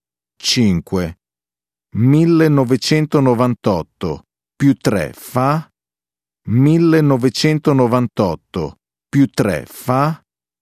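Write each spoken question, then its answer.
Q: 1998 più 3 fa?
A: 2001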